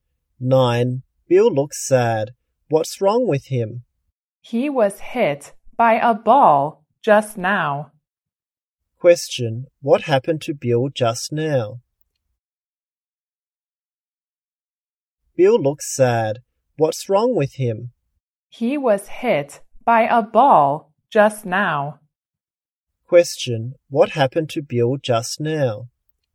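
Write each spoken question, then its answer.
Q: what happened to Bill just now?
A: He was hit by a ball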